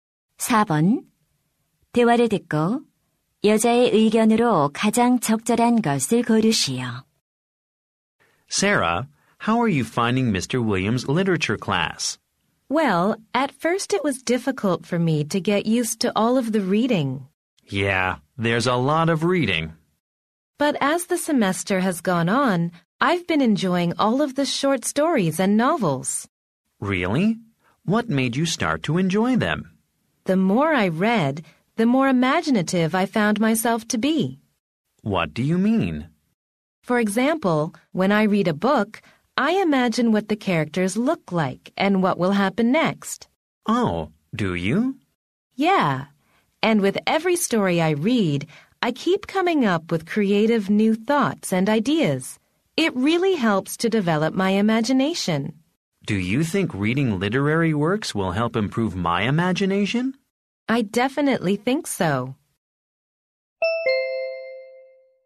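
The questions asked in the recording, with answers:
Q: 대화를 듣고 여자의 의견으로 가장 적절한 것을 고르시오.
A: 문학 작품을 읽으면 상상력이 길러진다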